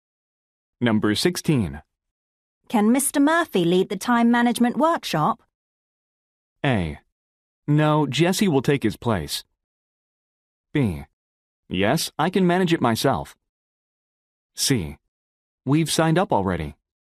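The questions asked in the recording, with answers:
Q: Can Mr. Murphy lead the time management workshop?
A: A: No, Jesse will take his place.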